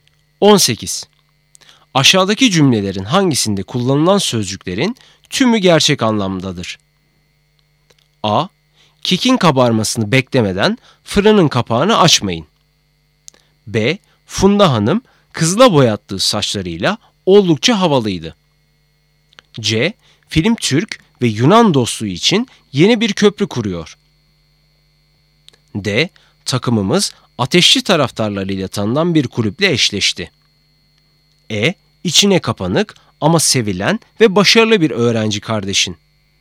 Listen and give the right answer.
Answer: Doğru cevap A. Kekin kabarmasını beklemeden fırının kapağını açmayın.